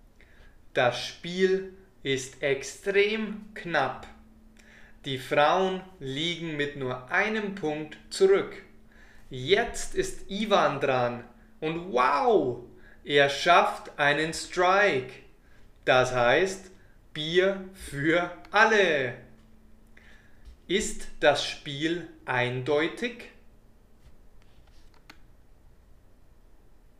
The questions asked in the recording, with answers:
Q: Ist das Spiel eindeutig?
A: Nein, es ist nicht eindeutig.